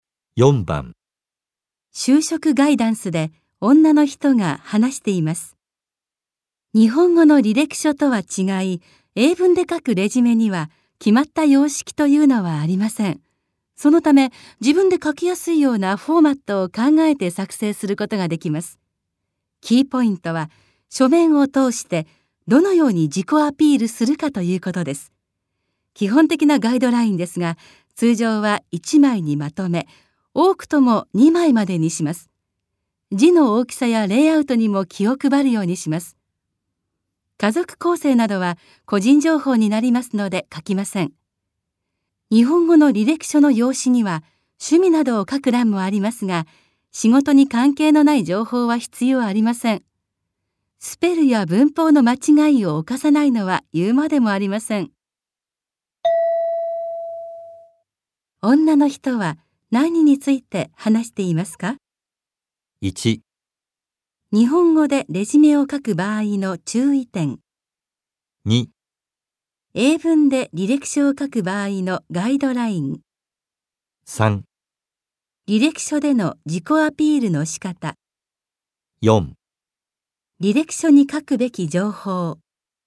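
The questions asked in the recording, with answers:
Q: 女の人は何について話していますか?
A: 2: 英文で履歴書を書く場合のガイドライン。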